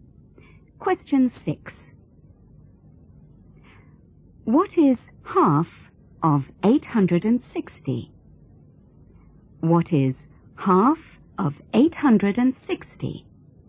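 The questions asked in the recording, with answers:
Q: What is half of 860?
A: 430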